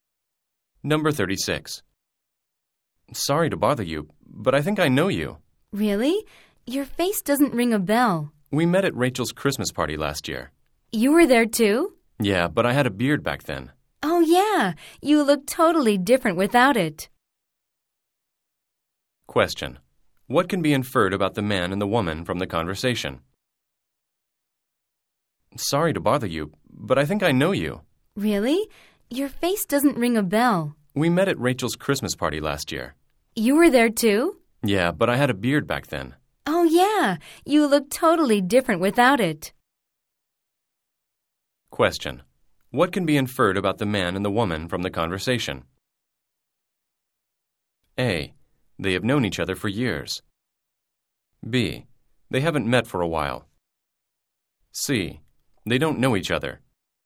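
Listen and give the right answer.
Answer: B: They haven't met for a while.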